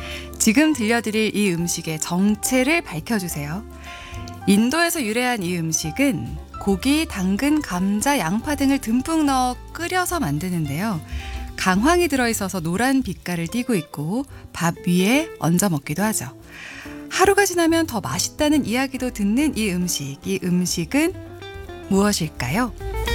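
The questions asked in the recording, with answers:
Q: 이 음식은 무엇일까요?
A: 카레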